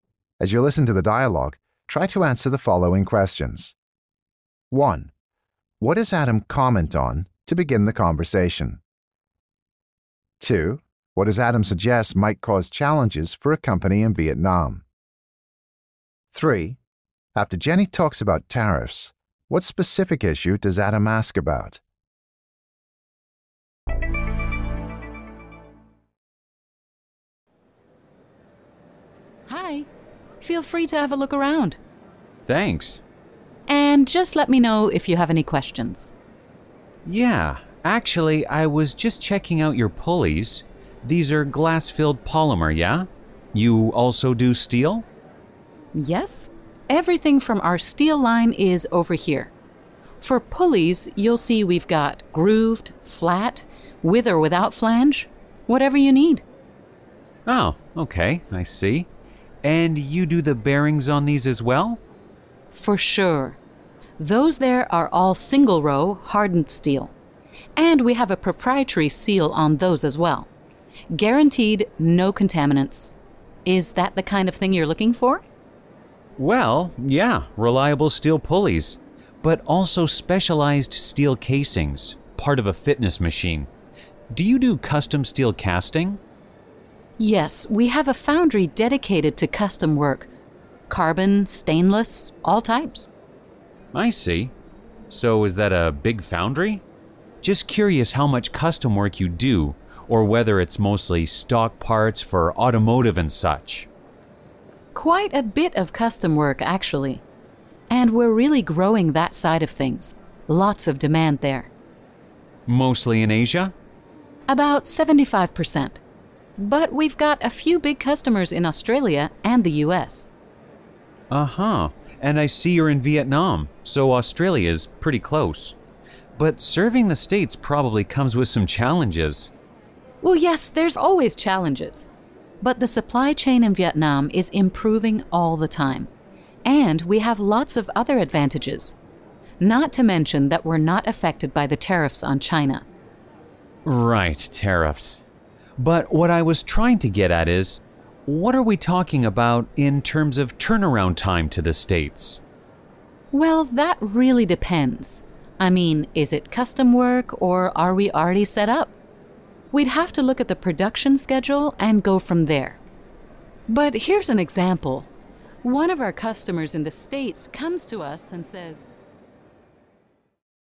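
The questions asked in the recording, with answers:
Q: What does Adam comment on to begin the conversation?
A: Jenny's display products, the pulleys

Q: What, as Adam suggests, might cause challenges for a company in Vietnam.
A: Serving customers in the States (the US)

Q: After Jenny talks about tariffs, what specific issue does Adam ask about?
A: Turnaround time to the States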